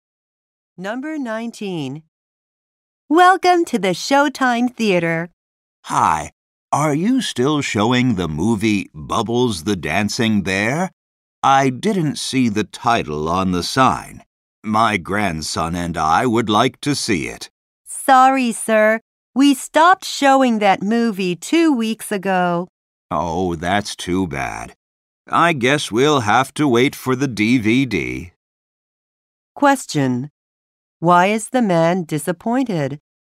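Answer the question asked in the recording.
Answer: The theater stopped showing the movie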